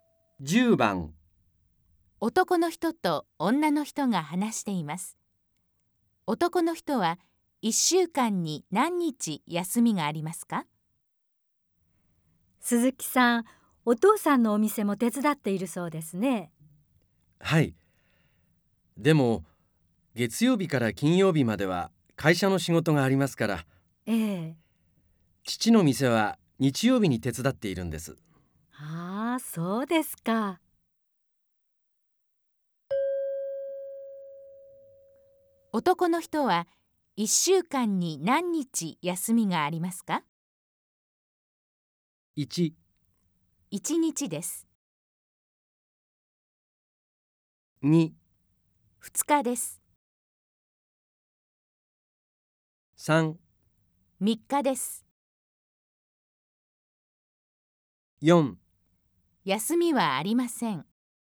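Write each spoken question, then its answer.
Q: 男の人は1週間に何日休みがありますか?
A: 1: 1日です。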